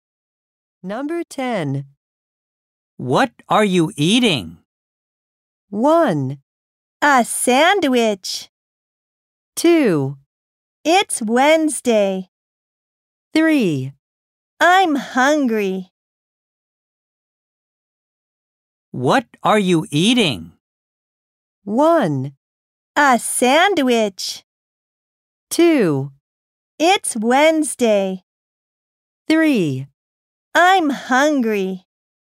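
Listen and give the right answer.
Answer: 1: A sandwich.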